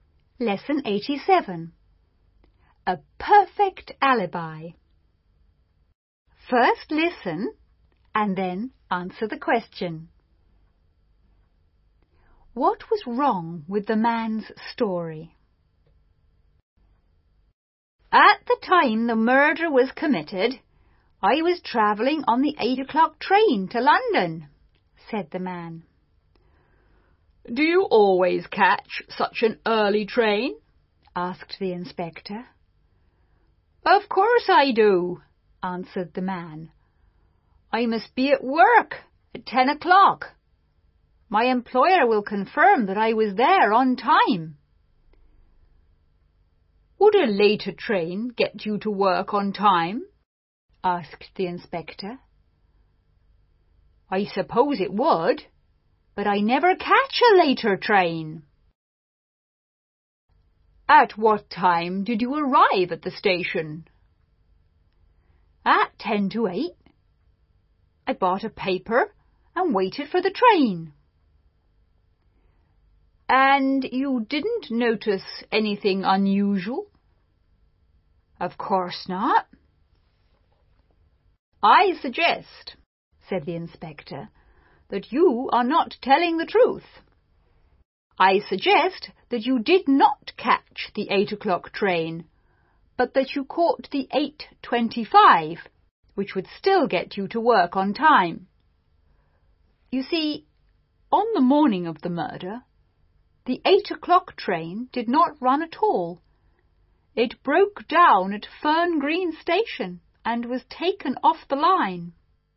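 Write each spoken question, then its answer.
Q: What was wrong with the man's story?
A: He said he caught the 8 o'clock train, but that train did not run that morning because it broke down at Fern Green Station.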